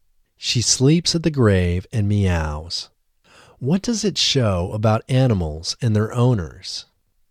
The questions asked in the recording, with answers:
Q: What does it show about animals and their owners?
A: It shows how close animals are to their owners.